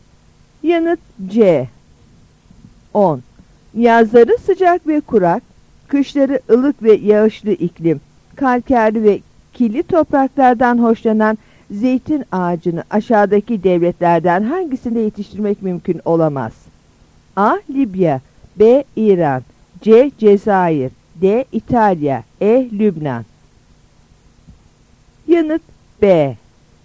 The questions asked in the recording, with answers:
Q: Yazları sıcak ve kurak, kışları ılık ve yağışlı iklim, kalkerli ve kirli topraklardan hoşlanan zeytin ağacını aşağıdaki devletlerden hangisinde yetiştirmek mümkün olamaz?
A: Yanıt B.